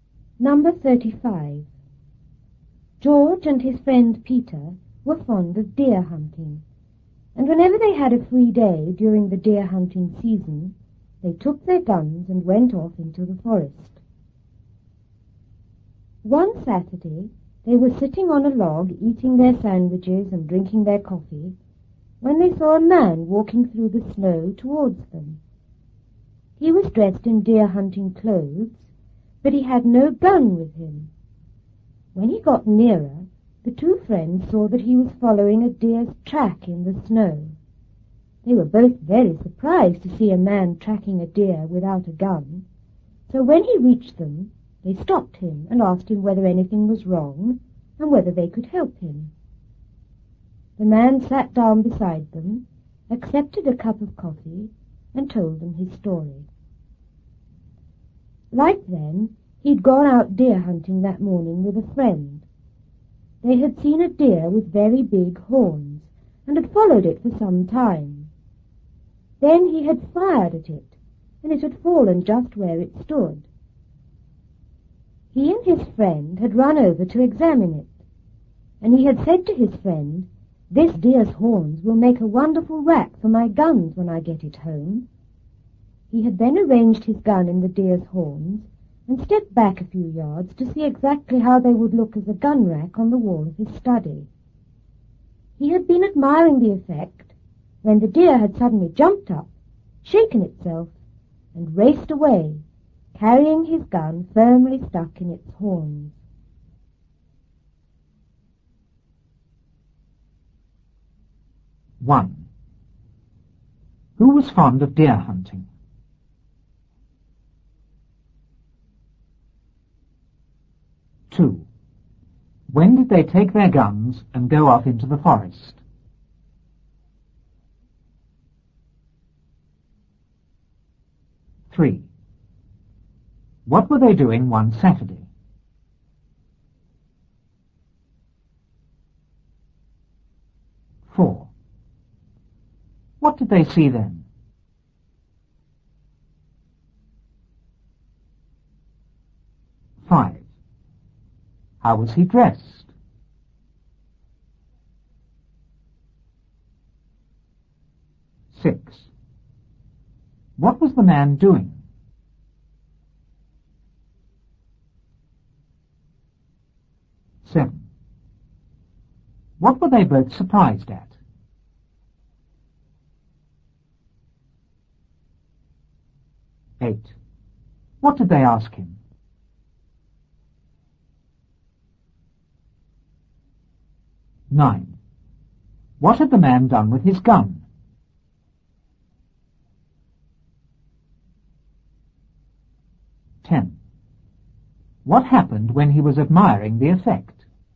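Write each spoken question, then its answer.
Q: Who was fond of deer hunting?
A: George and his friend Peter

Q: When did they take their guns and go off into the forest?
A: Whenever they had a free day during the deer hunting season

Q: What were they doing one Saturday?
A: Sitting on a log, eating sandwiches and drinking coffee

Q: What did they see then?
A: A man walking through the snow towards them

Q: How was he dressed?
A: In deer hunting clothes

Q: What was the man doing?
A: Following a deer's track in the snow

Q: What were they both surprised at?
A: To see a man tracking a deer without a gun

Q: What did they ask him?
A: Whether anything was wrong and whether they could help him

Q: What had the man done with his gun?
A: Arranged it in the deer's horns

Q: What happened when he was admiring the effect?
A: The deer jumped up and raced away with his gun stuck in its horns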